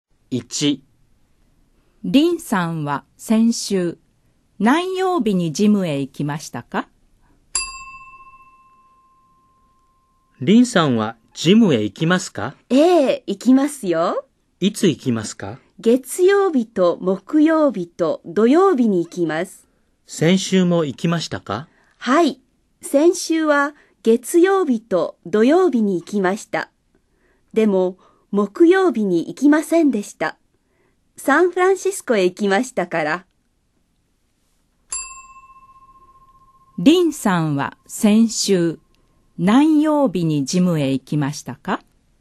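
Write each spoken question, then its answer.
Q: リンさんは先週何曜日にジムへ行きましたか?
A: 月曜日と土曜日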